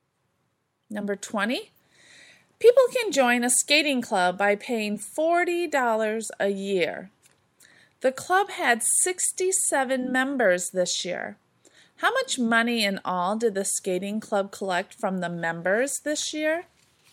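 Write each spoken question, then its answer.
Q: How much money in all did the skating club collect from the members this year?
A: $2,680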